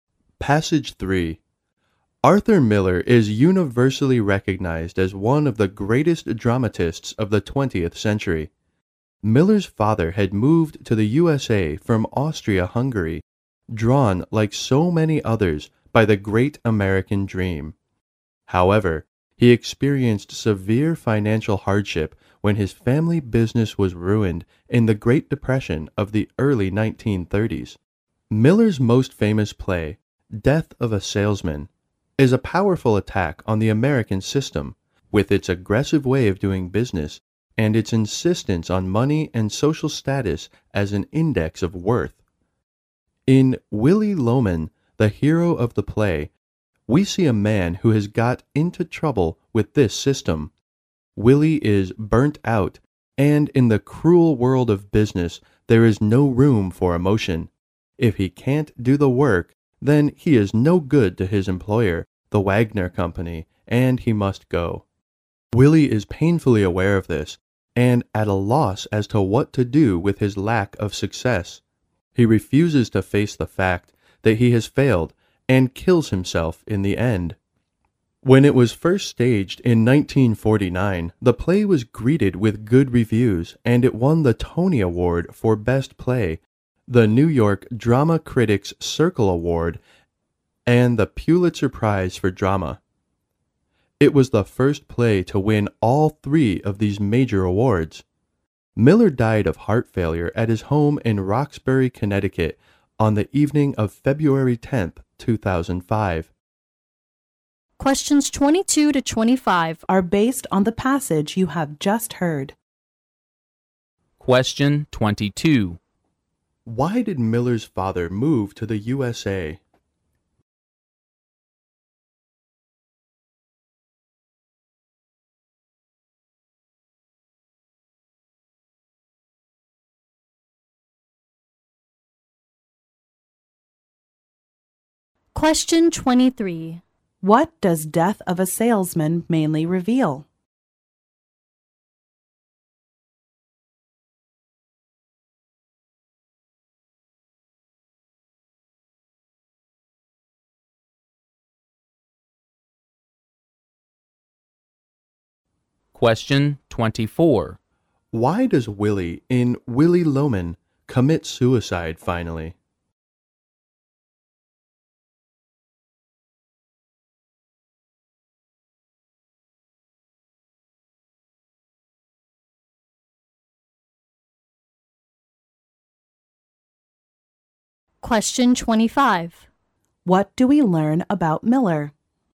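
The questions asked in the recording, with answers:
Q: Why did Miller's father move to the USA?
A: He was drawn by the American dream.

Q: What does Death of a Salesman mainly reveal?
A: The cruelty of the American business system and its focus on money and status.

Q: Why does Willie in Willie Loman commit suicide finally?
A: He refuses to face the fact that he has failed.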